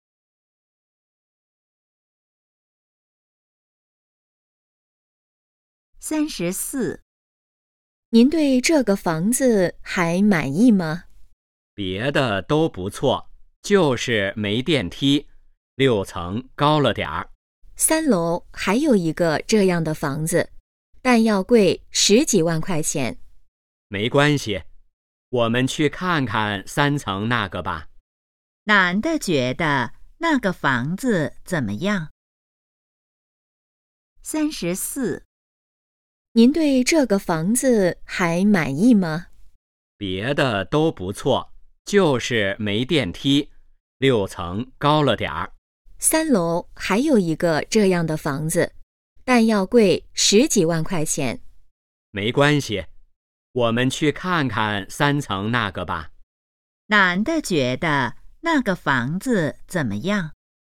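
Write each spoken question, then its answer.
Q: 男的觉得那个房子怎么样?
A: 没电梯,六层太高了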